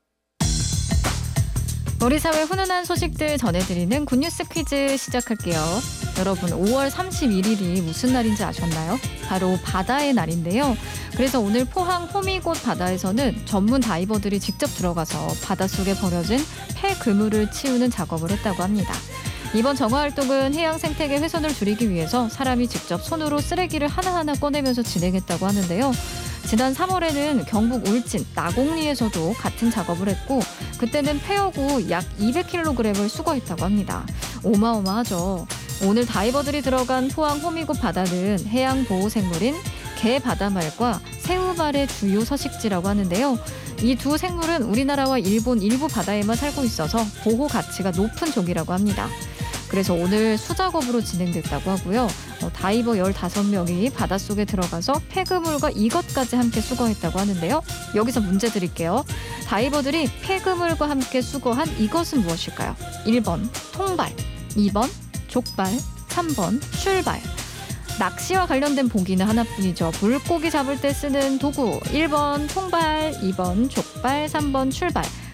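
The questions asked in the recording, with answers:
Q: 다이버들이 폐그물과 함께 수거한 이것은 무엇일까요?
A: 1: 통발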